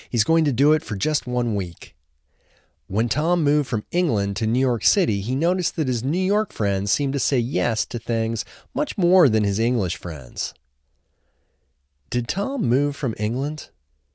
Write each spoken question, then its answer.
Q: Did Tom move from England?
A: Yes, he moved from England.